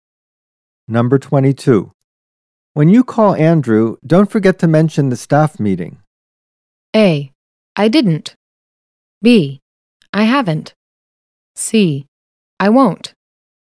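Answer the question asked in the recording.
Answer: C: I won't.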